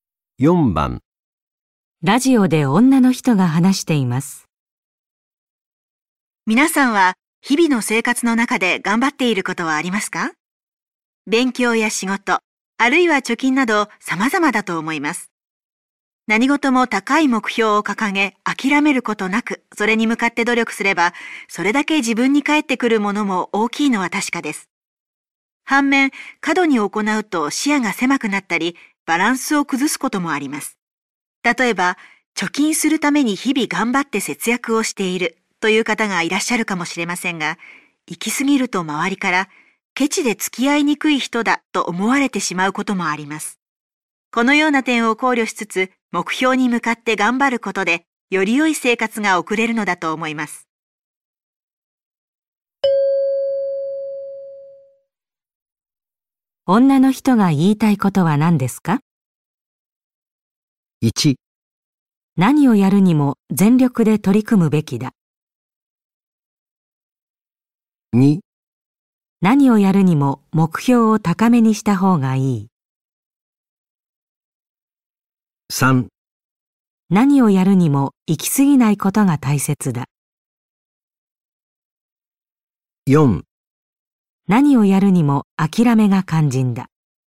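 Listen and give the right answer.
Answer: 3: 何をやるにも行き過ぎないことが大切だ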